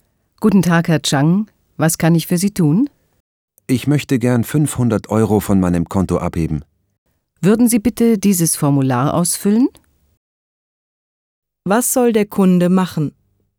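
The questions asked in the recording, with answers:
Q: Was soll der Kunde machen?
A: Ein Formular ausfüllen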